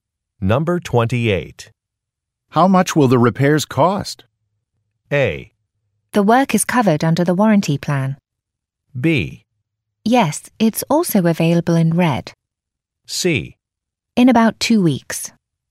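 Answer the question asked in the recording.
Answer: A: The work is covered under the warranty plan.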